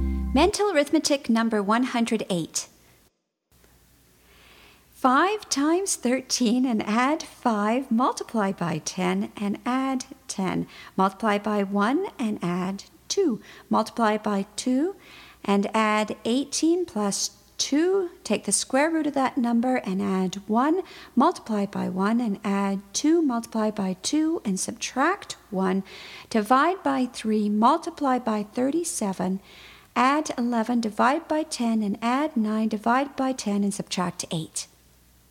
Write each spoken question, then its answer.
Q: 5 times 13 and add 5, multiply by 10 and add 10. Multiply by 1 and add 2. Multiply by 2 and add 18 plus 2. Take the square root of that number and add 1. Multiply by 1 and add 2. Multiply by 2 and subtract 1. Divide by 3. Multiply by 37. Add 11. Divide by 10 and add 9. Divide by 10 and subtract 8.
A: And the answer is 3.